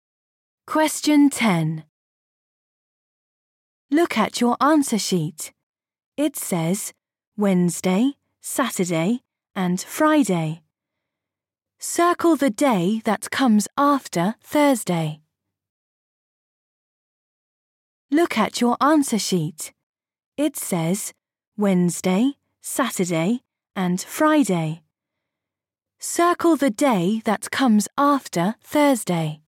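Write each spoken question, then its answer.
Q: Circle the day that comes after Thursday.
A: Friday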